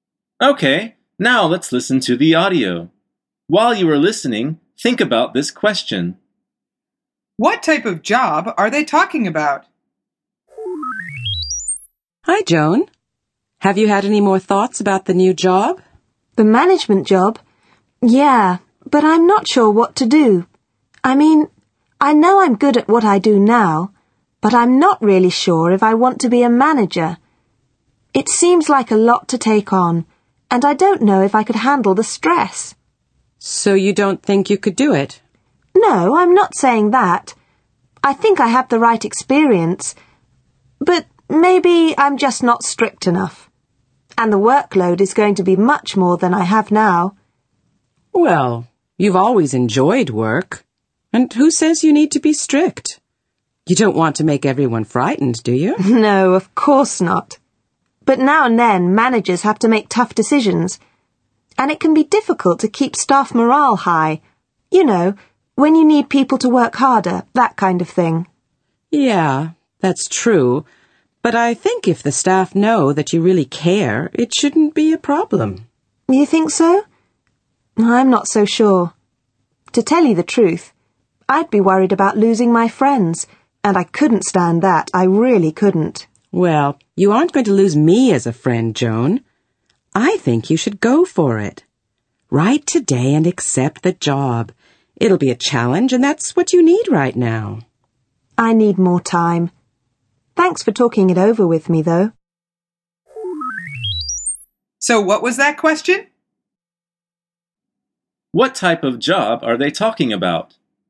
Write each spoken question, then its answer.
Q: What type of job are they talking about?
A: The answer is a job in management.